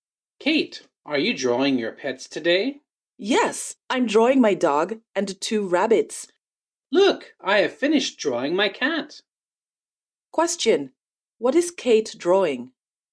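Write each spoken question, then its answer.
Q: Question, what is Kate drawing?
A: Her dog and two rabbits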